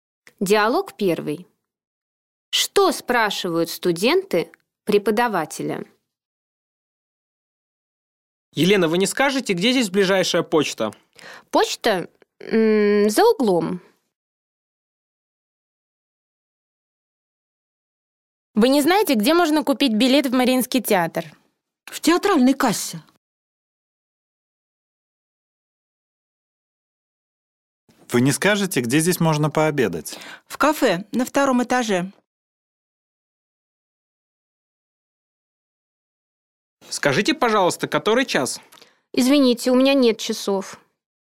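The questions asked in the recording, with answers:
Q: Что спрашивают студенты преподавателя?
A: Где ближайшая почта, где купить билет в Мариинский театр, где пообедать, который час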